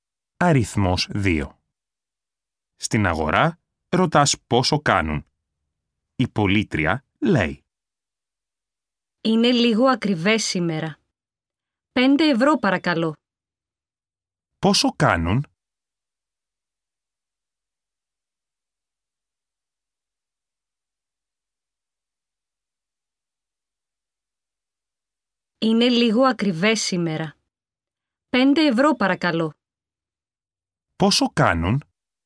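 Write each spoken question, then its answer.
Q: Πόσο κάνουν?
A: 5 ευρώ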